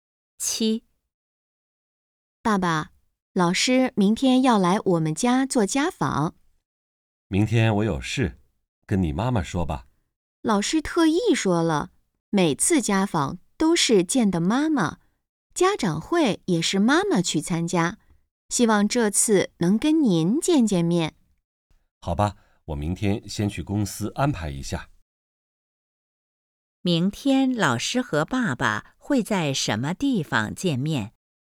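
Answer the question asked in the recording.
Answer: 在家里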